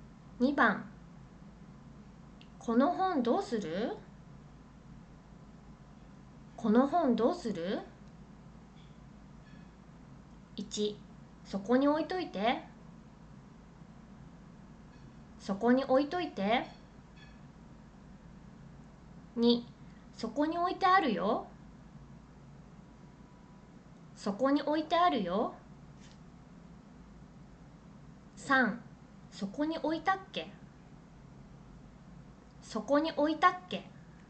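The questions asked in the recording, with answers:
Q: この本どうする?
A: 1: そこに置いといて。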